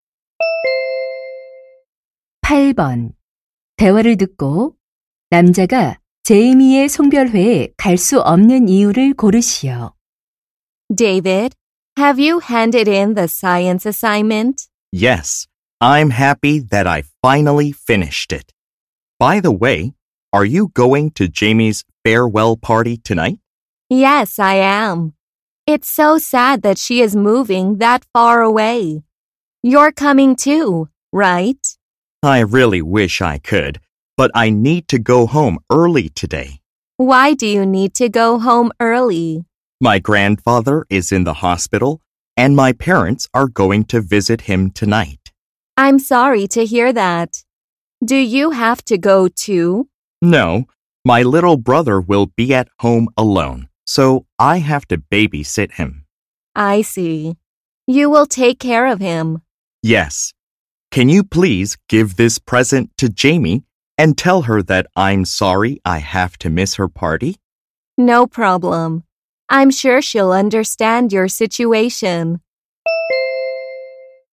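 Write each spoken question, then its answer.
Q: 대화를 듣고 남자가 제이미의 송별회에 갈 수 없는 이유를 고르시오.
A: 남동생을 돌봐야 해서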